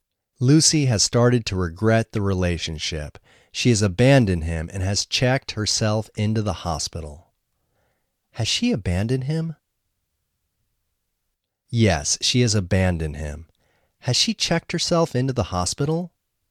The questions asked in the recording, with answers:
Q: Has she checked herself into the hospital?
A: Yes, she has checked herself into the hospital.